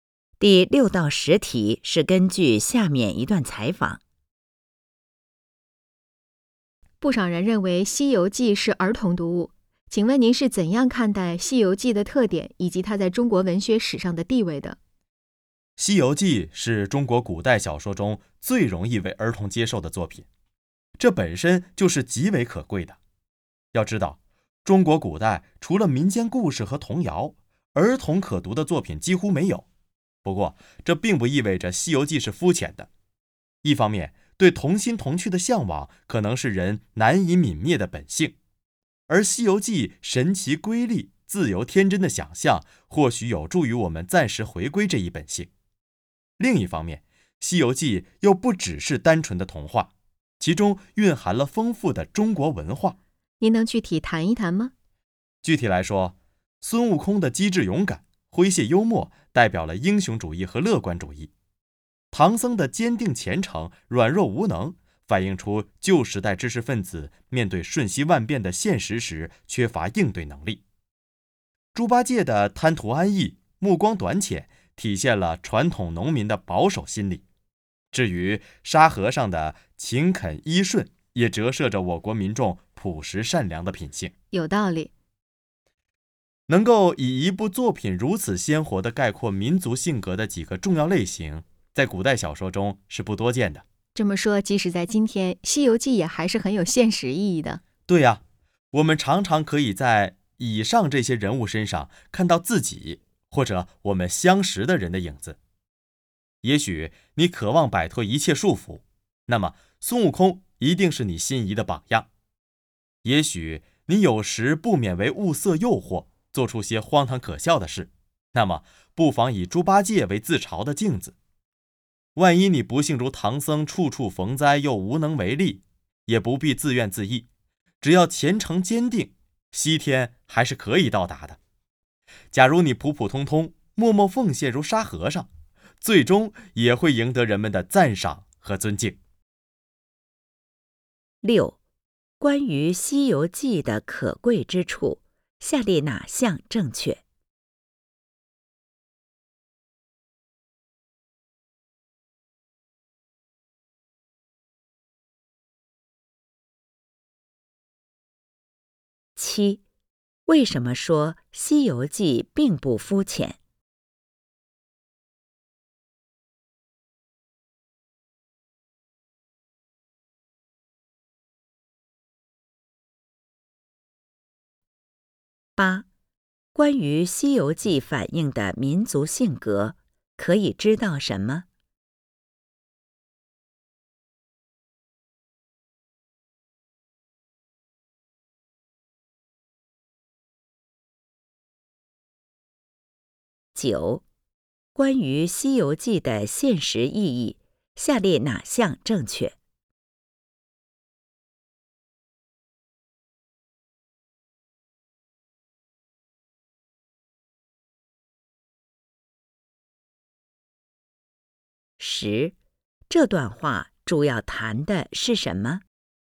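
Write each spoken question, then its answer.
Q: 关于《西游记》的可贵之处,下列哪项正确?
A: 它是中国古代小说中最容易为儿童接受的作品

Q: 为什么说《西游记》并不肤浅?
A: 它不只是单纯的童话,蕴含了丰富的中国文化

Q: 关于《西游记》的现实意义,下列哪项正确?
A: 人们常能在书中人物身上看到自己或熟人的影子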